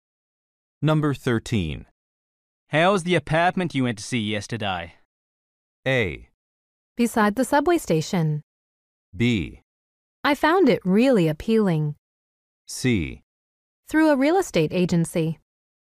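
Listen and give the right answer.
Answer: B: I found it really appealing.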